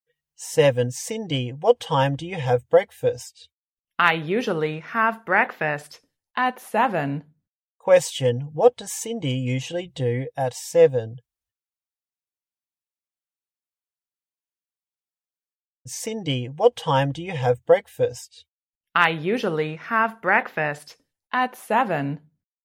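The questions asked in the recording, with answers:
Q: What does Cindy usually do at 7?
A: She has breakfast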